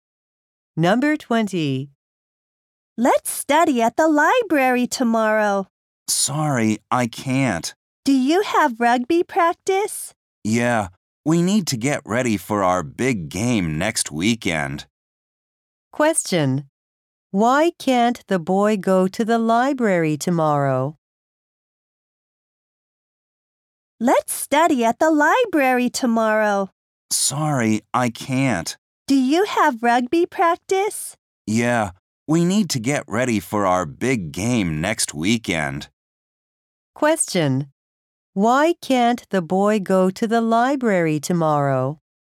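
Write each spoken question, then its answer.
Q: Why can't the boy go to the library tomorrow?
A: He has rugby practice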